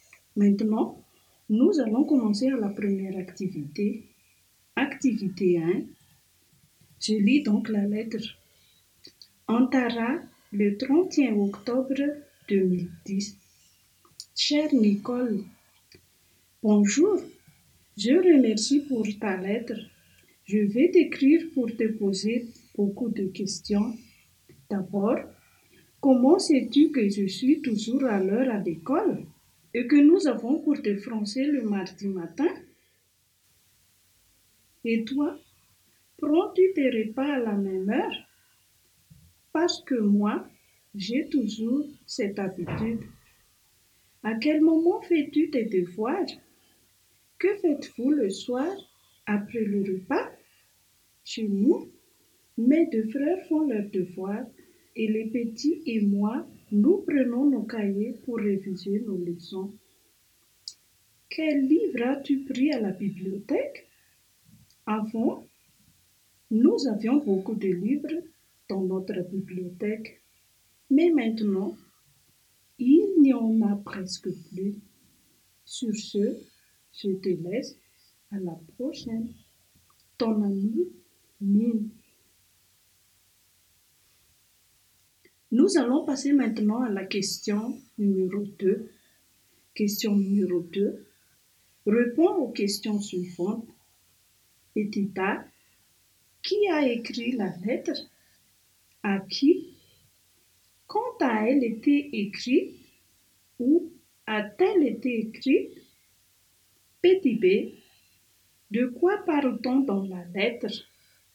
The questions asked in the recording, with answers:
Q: Qui a écrit la lettre?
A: Mino a écrit à Nicole.

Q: À qui?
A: Mino a écrit à Nicole.

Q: Quand a-t-elle été écrite?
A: Elle a écrit la lettre le 31 octobre 2010.

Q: Où a-t-elle été écrite?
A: Elle l'a écrit Tantara.

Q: De quoi parle-t-on dans la lettre?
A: Mim pose des questions à Nicole.